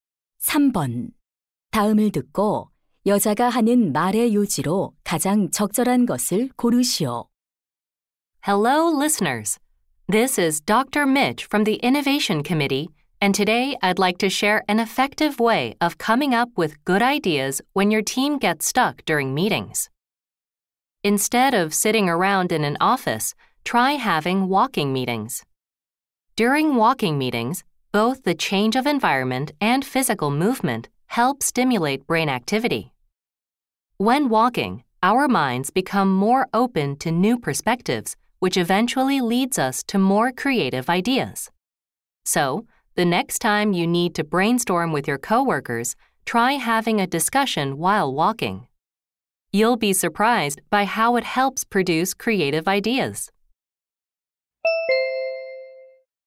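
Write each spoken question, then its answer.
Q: 다음을 듣고 여자가 하는 말의 요지로 가장 적절한 것을 고르시오.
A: 걷기 회의는 창의적인 아이디어를 내는 데 도움이 된다.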